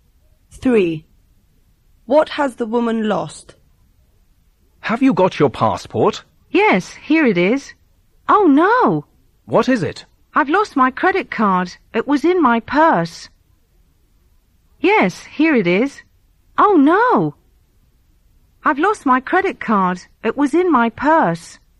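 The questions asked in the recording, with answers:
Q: What has the woman lost?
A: Her credit card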